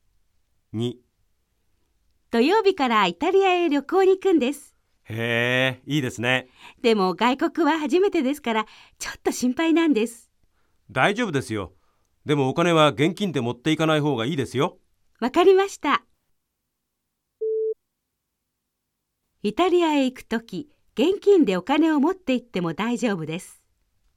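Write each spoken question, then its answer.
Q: イタリアへ行くとき、現金でお金を持って行っても大丈夫です。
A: ×(正しくない)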